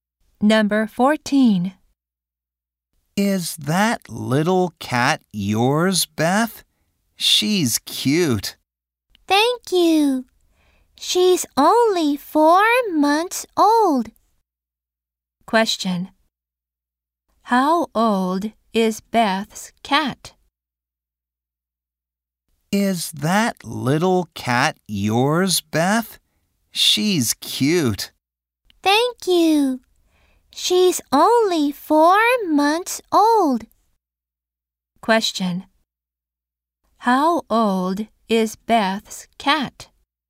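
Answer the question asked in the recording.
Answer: Four months old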